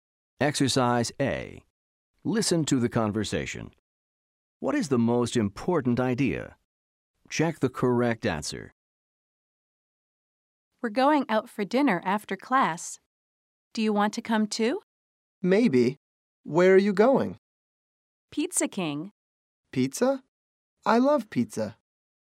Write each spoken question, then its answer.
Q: What is the most important idea?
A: The answer is dinner. They're talking about dinner.